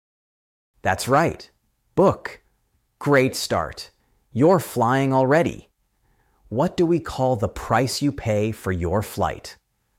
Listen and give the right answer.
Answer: The flight fare.